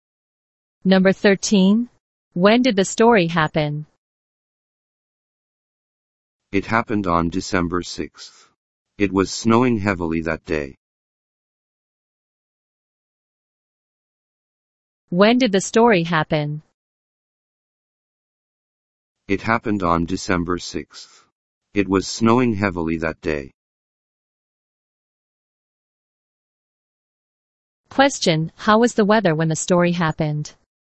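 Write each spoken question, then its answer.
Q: how was the weather when the story happened?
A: It was snowing heavily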